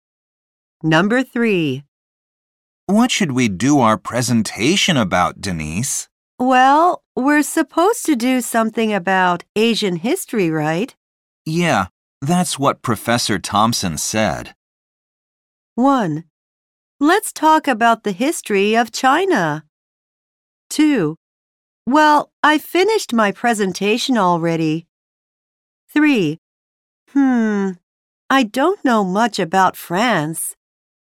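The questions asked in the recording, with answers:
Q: Yeah, that's what Professor Thompson said.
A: 1: Let's talk about the history of China.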